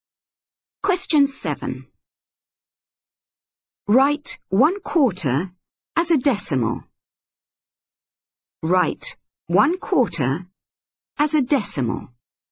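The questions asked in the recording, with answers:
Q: Write 1/4 as a decimal.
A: 0.25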